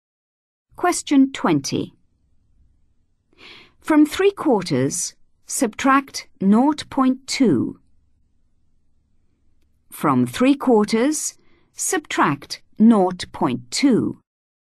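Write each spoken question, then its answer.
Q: From 3/4, subtract 0.2.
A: 0.55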